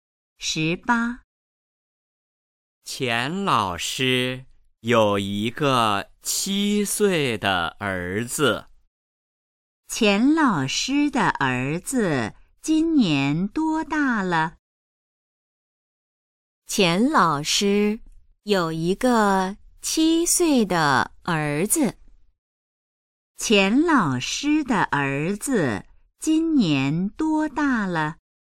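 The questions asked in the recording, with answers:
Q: 钱老师的儿子今年多大了?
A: 七岁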